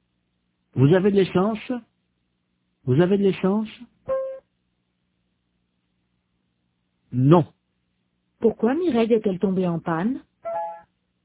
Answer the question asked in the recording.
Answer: Parce qu'elle n'avait plus d'essence.